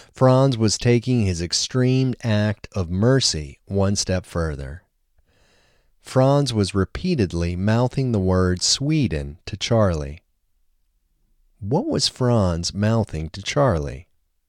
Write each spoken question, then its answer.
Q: What was Franz mouthing to Charlie?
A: Franz was mouthing Sweden to Charlie.